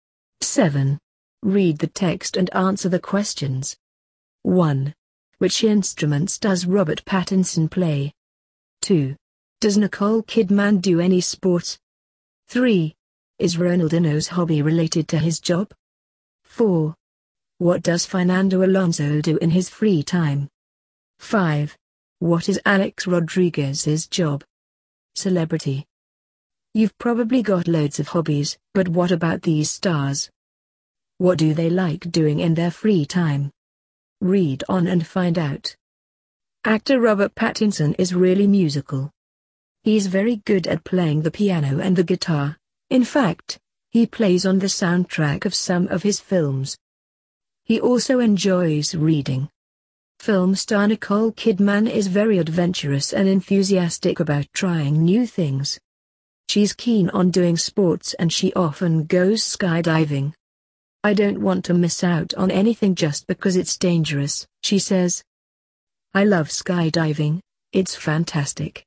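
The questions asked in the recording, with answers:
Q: Which instruments does Robert Pattinson play?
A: The piano and the guitar

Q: Does Nicole Kidman do any sports?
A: Yes, she often goes skydiving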